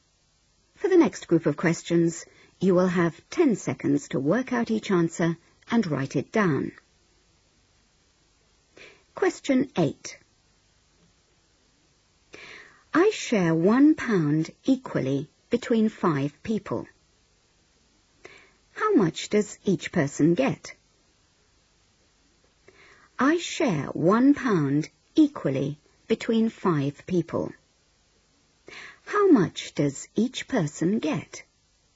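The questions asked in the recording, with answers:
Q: How much does each person get?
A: 20p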